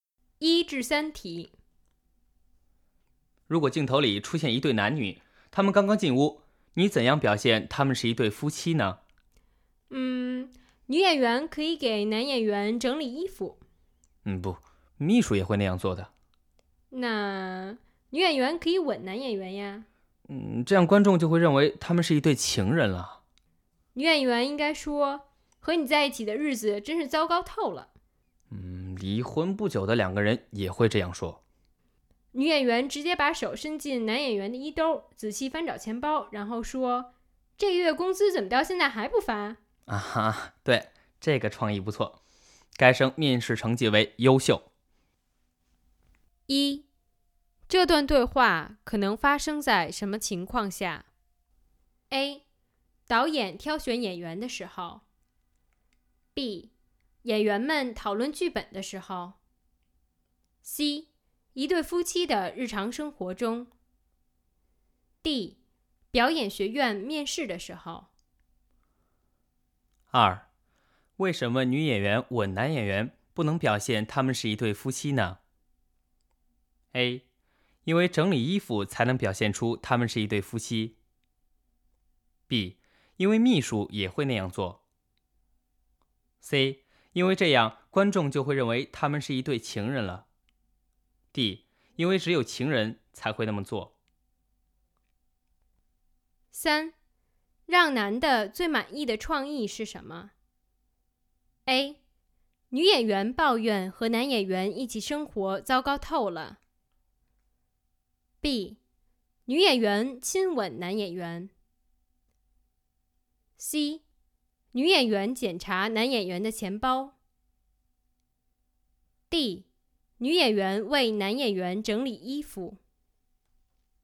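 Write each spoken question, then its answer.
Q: 这段对话可能发生在什么情况下?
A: D: 表演学院面试的时候。

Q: 为什么女演员吻男演员不能表现他们是一对夫妻呢?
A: C: 因为这样观众就会认为他们是一对情人了。

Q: 让男的最满意的创意是什么?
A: C: 女演员检查男演员的钱包。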